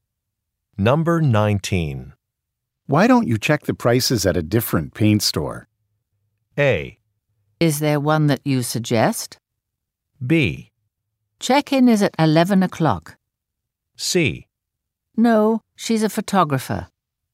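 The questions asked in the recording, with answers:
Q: Why don't you check the prices at a different paint store?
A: A: Is there one that you suggest?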